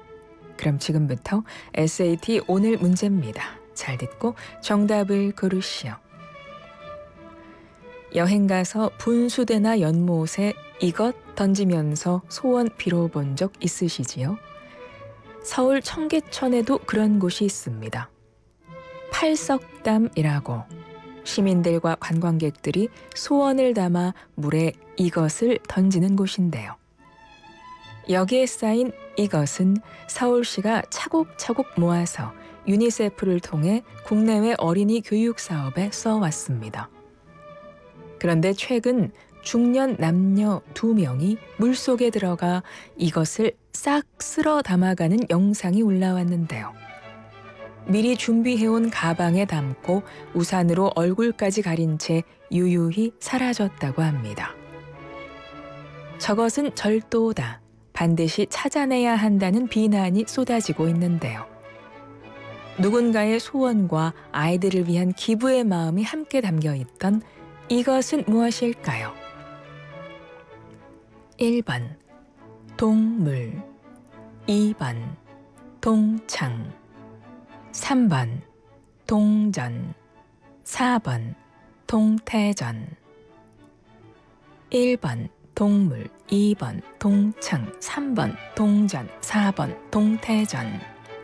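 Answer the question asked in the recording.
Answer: 3: 동전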